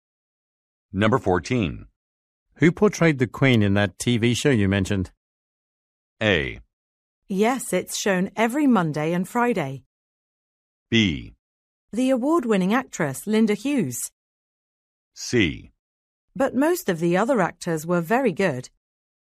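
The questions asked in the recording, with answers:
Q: Who portrayed the Queen in that TV show you mentioned?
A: B: The award-winning actress, Linda Hughes.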